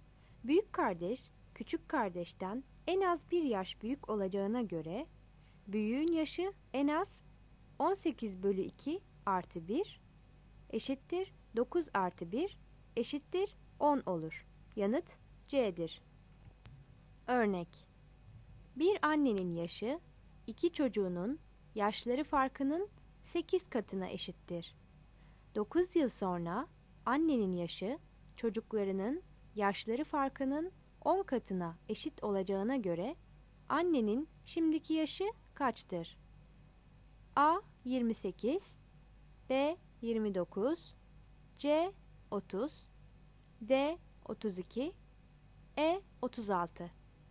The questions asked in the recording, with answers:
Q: 9 yıl sonra annenin yaşı çocuklarının yaşları farkının 10 katına eşit olacağına göre annenin şimdiki yaşı kaçtır?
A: Yanıt E'dir.